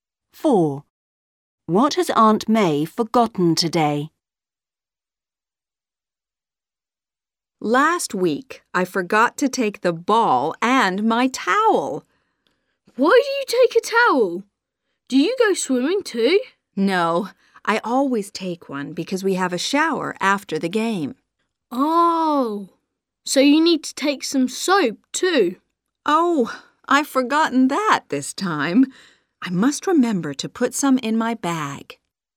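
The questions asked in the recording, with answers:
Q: What has Aunt May forgotten today?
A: soap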